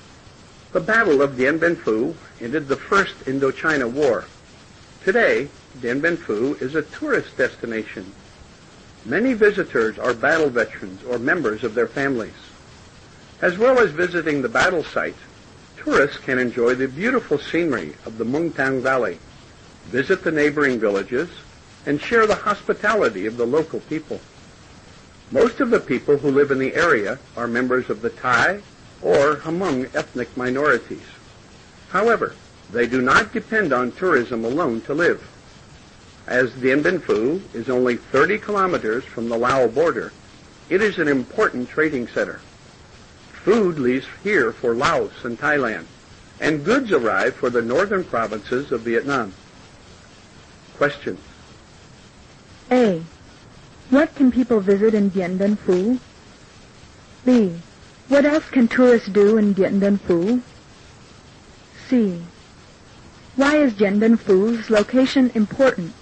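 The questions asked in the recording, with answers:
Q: What can people visit in Dien Bien Phu?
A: The battle site

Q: What else can tourists do in Dien Bien Phu?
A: Enjoy the scenery of the Mungtang Valley, visit neighboring villages, and share the hospitality of the local people

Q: Why is Dien Bien Phu's location important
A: It is only 30 km from the Lao border, so it is an important trading center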